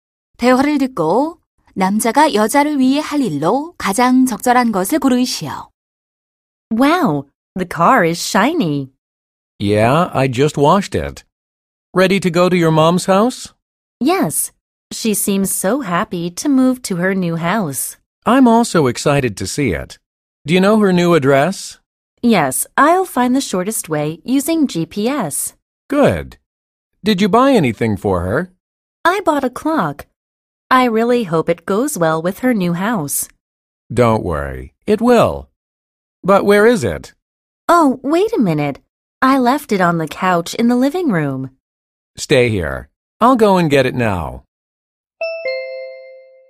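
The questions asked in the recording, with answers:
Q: 대화를 듣고 남자가 여자를 위해 할 일로 가장 적절한 것을 고르시오.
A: 거실 소파에 둔 시계 가져오기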